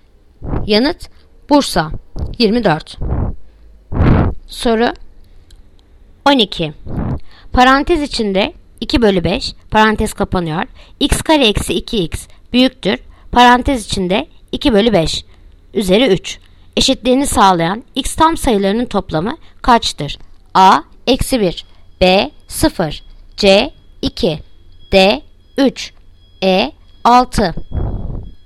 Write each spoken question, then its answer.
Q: Eşitliğini sağlayan x tam sayılarının toplamı kaçtır?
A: Yanıt Diyarbakır 3.